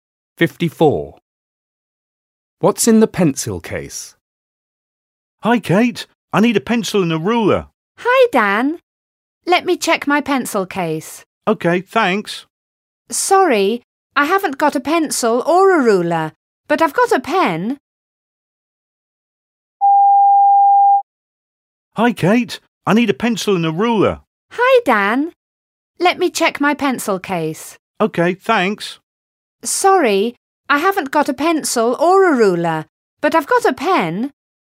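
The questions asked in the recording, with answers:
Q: What's in the pencil case?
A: A pen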